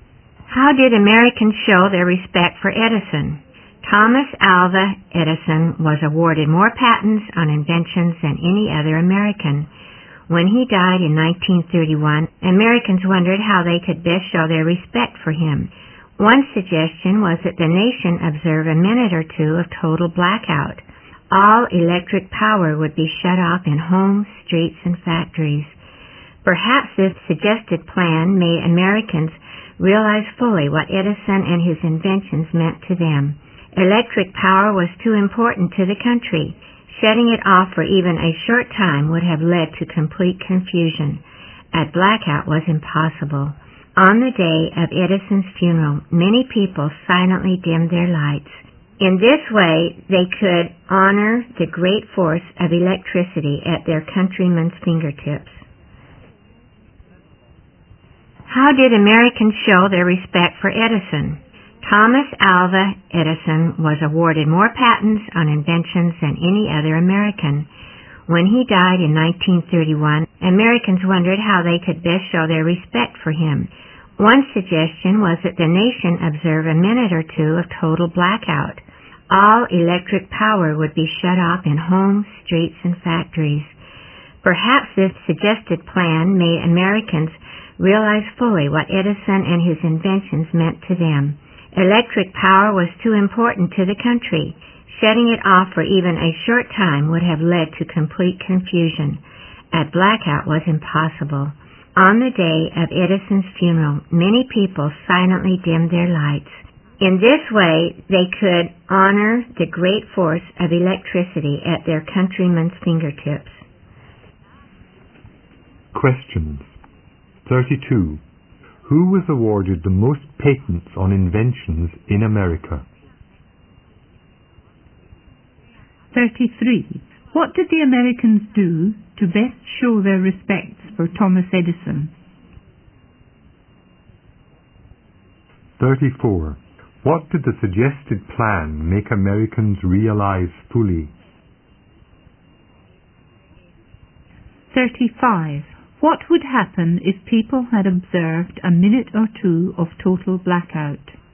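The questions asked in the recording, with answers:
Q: Who was awarded the most patents on inventions in America?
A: Thomas Alva Edison

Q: What did the Americans do to best show their respects for Thomas Edison?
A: On the day of his funeral, many people silently dimmed their lights.

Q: What did the suggested plan make Americans realize fully?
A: What Edison and his inventions meant to them.

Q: What would happen if people had observed a minute or two of total blackout?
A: It would have led to complete confusion.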